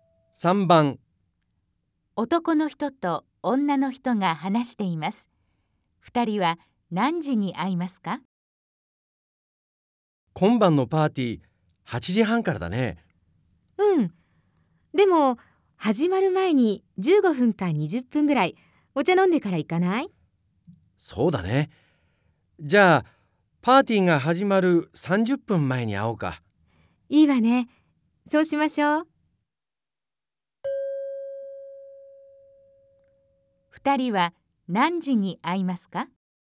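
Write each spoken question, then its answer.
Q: 二人は何時に会いますか?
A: 8時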